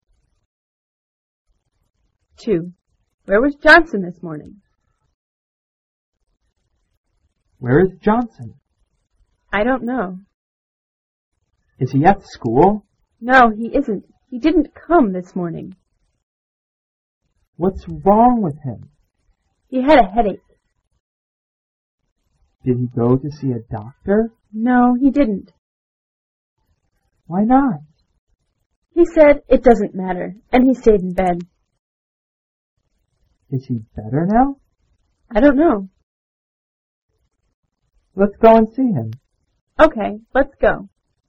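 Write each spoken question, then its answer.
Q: Where was Johnson this morning?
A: At home in bed.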